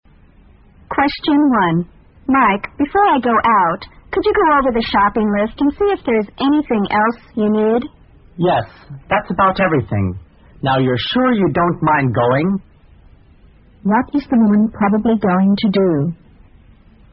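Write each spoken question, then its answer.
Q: What is the woman probably going to do?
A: Go shopping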